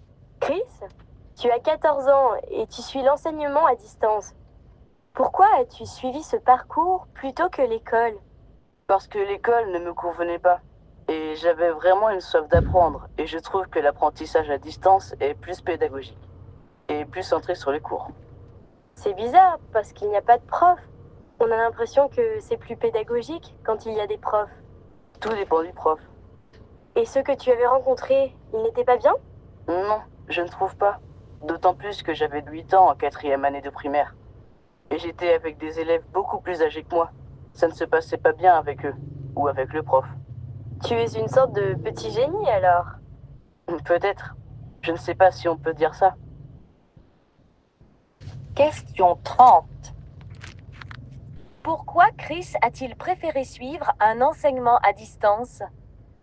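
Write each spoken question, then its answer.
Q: Pourquoi Chris a-t-il préféré suivre un enseignement à distance?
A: Parce que l'école ne lui convenait pas et qu'il avait une soif d'apprendre; il trouve l'apprentissage à distance plus pédagogique.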